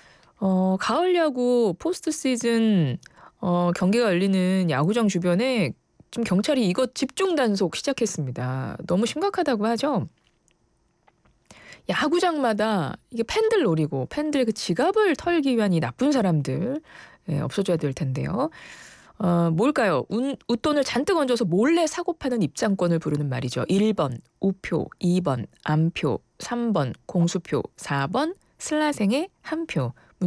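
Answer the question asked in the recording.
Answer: 2번: 암표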